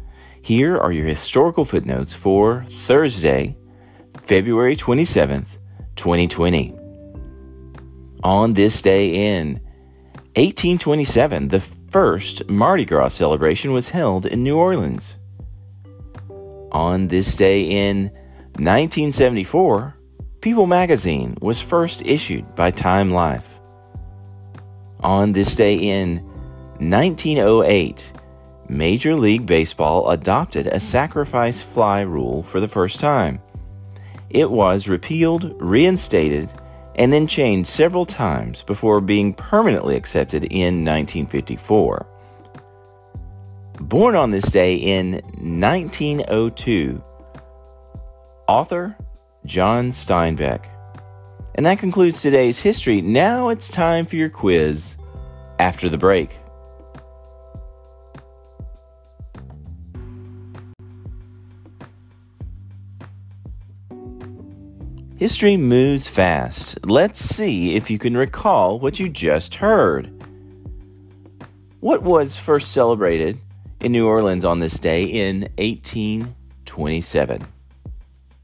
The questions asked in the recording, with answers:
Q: What was first celebrated in New Orleans on this day in 1827?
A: Answer, Mardi Gras.